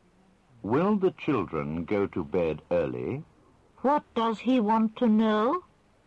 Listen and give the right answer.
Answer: He wants to know if the children will go to bed early.